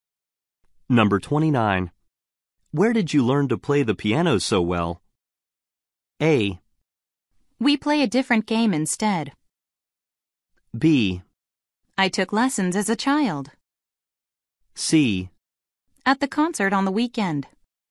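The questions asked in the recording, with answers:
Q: Where did you learn to play the piano so well?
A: B: I took lessons as a child.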